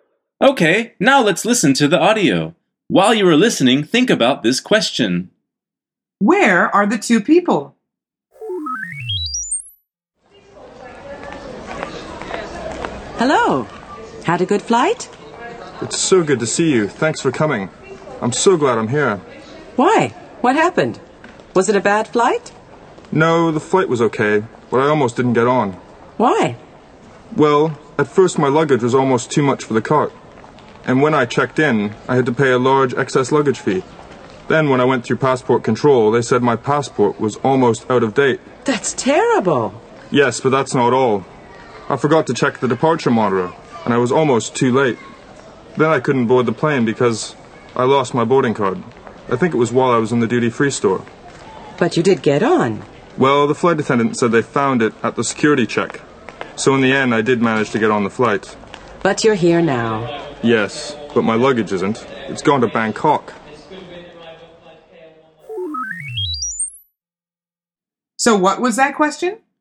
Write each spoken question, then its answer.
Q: Where are the two people?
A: The answer is at the airport.